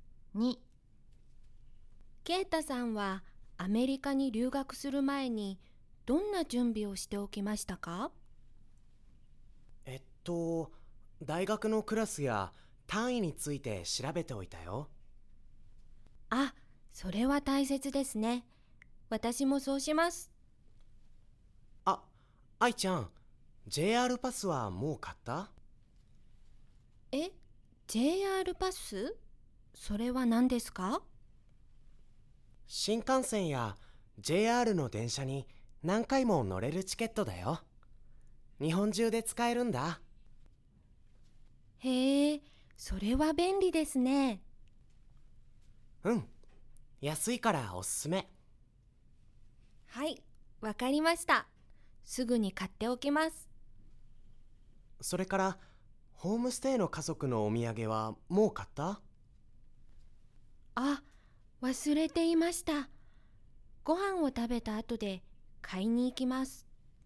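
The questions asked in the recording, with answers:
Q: ケイタさんはアメリカに留学する前にどんな準備をしておきましたか?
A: 大学のクラスや単位について調べておいた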